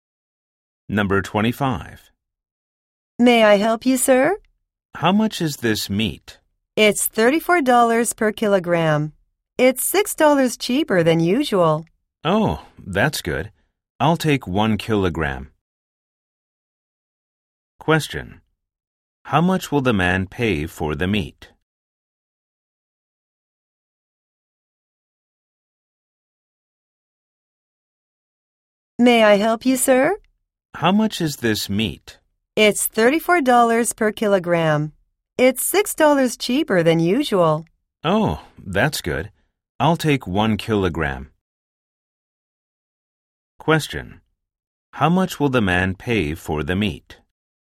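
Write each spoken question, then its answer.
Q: How much will the man pay for the meat?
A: $34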